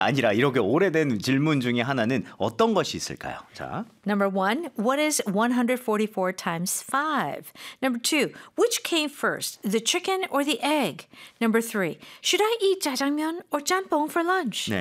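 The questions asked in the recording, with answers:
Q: 아니라 이렇게 오래된 질문 중에 하나는 어떤 것이 있을까요?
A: 2: Which came first, the chicken or the egg?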